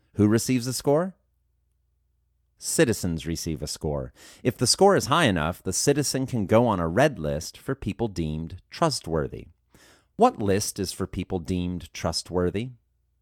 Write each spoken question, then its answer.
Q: What list is for people deemed trustworthy?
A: The red list is for people deemed trustworthy.